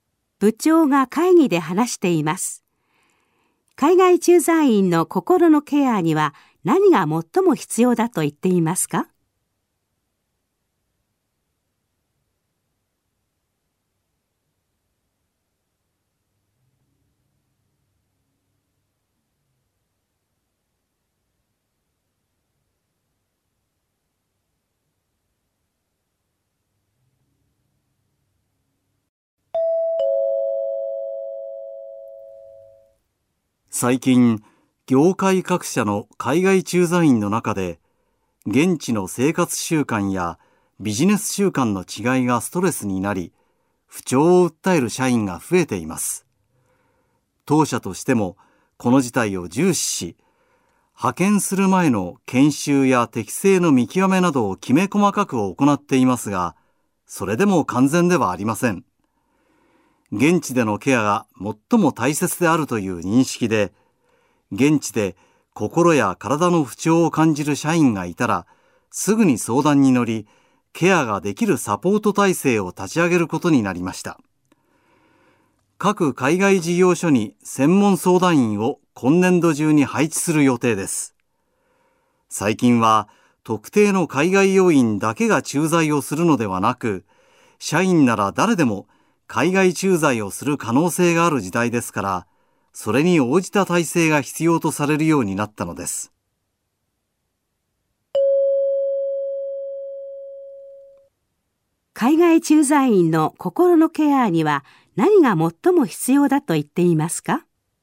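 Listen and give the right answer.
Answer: 現地でのケア(すぐに相談に乗れるサポート体制)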